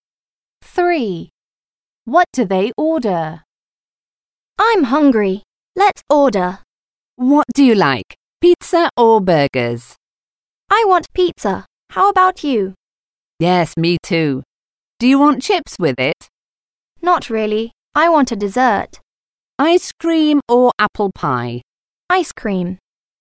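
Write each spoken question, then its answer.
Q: What do they order?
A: pizza and ice cream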